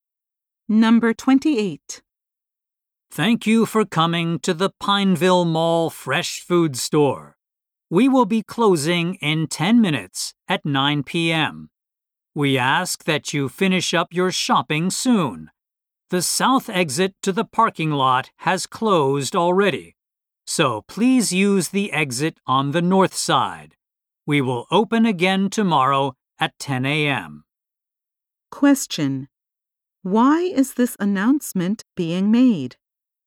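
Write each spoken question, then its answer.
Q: Why is this announcement being made?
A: The store will close in 10 minutes.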